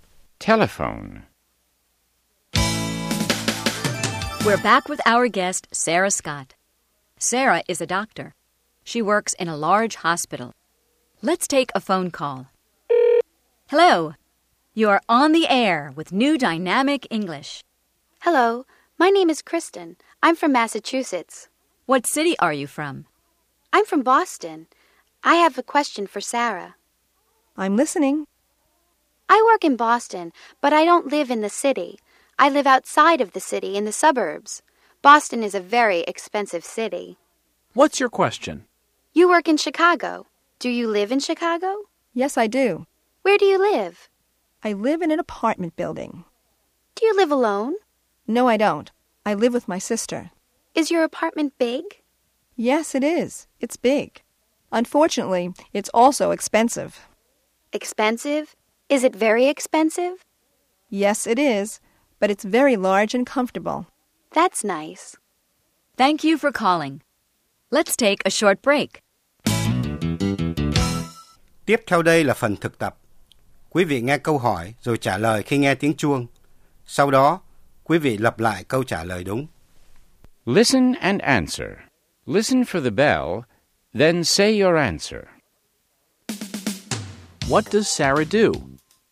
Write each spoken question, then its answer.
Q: What does Sarah do?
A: She's a doctor.